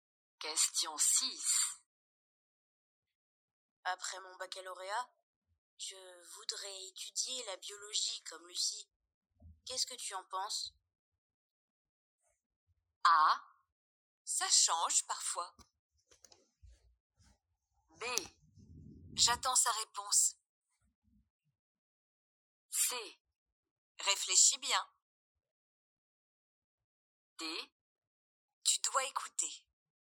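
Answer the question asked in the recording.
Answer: C: Réfléchis bien.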